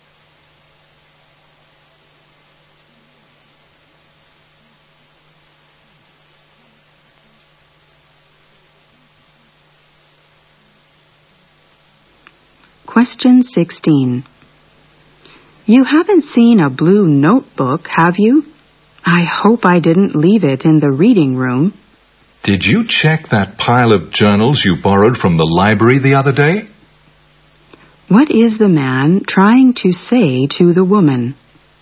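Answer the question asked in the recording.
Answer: The notebook may be in the pile of journals she borrowed from the library.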